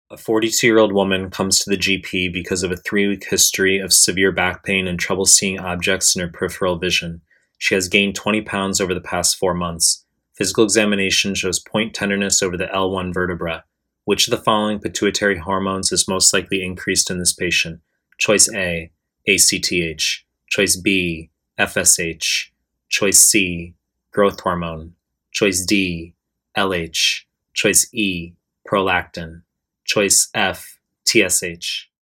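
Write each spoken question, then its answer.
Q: Which of the following pituitary hormones is most likely increased in this patient?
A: A: ACTH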